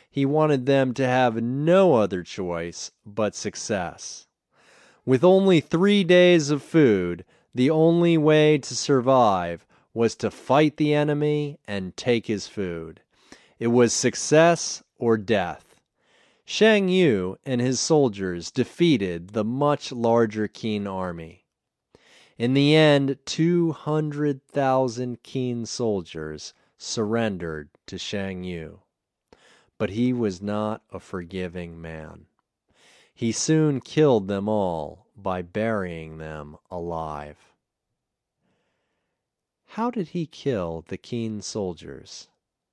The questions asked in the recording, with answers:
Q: How did he kill the Qin soldiers?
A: He killed them by burying them alive.